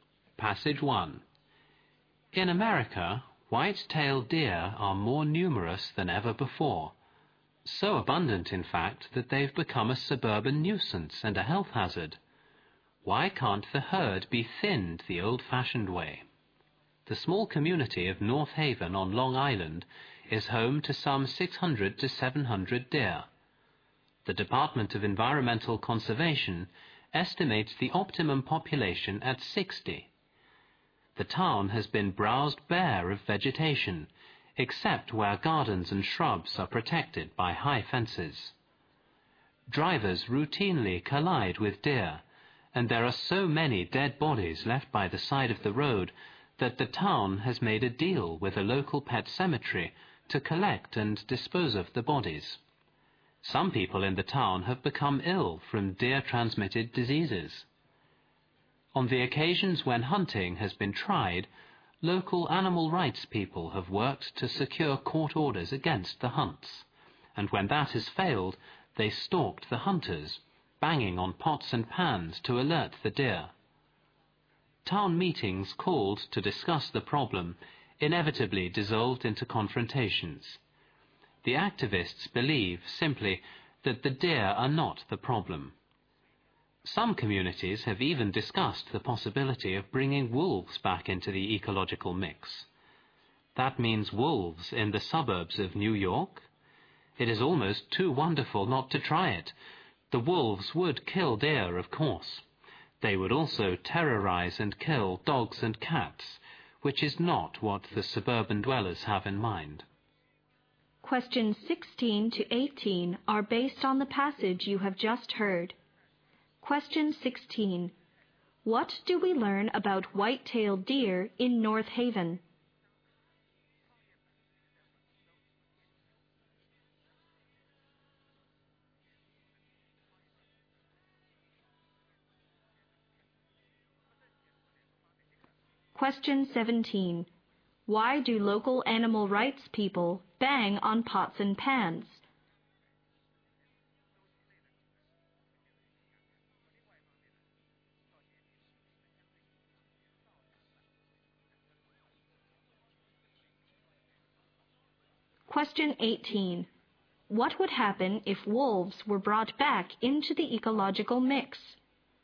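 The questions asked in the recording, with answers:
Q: What do we learn about white-tailed deer in North Haven?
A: There are far too many of them, about 600-700 compared with an optimum of 60.

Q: Why do local animal rights people bang on pots and pans?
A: To alert the deer to the hunters.

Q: What would happen if wolves were brought back into the ecological mix?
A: The wolves would also kill people's dogs and cats.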